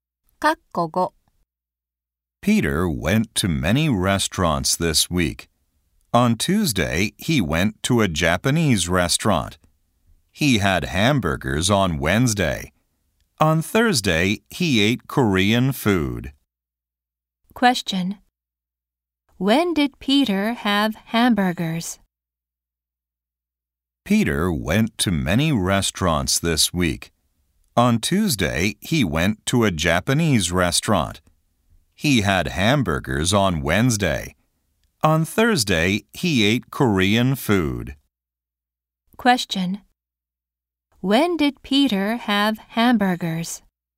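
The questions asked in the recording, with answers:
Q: When did Peter have hamburgers?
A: On Wednesday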